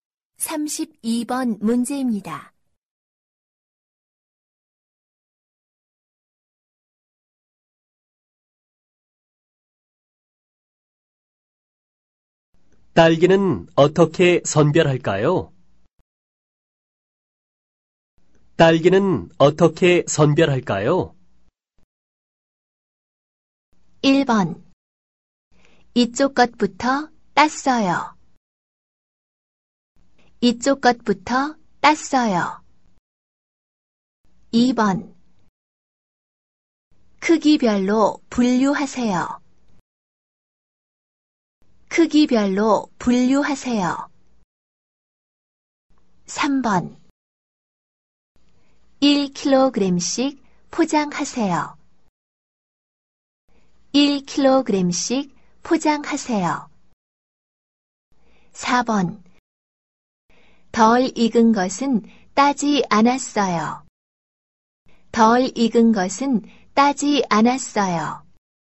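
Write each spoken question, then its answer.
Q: 딸기는 어떻게 선별할까요?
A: 2: 크기별로 분류하세요.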